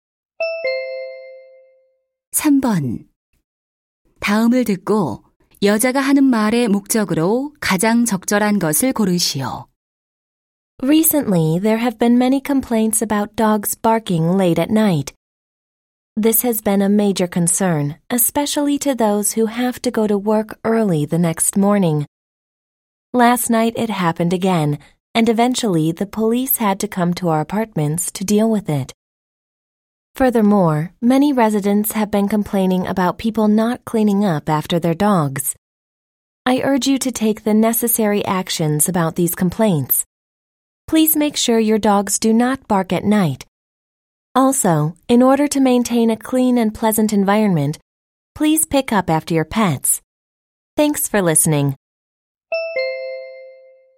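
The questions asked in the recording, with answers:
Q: 다음을 듣고 여자가 하는 말의 목적으로 가장 적절한 것을 고르시오.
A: 반려견이 밤에 짖지 않게 하고 배설물을 치우도록 주민들에게 요청하려고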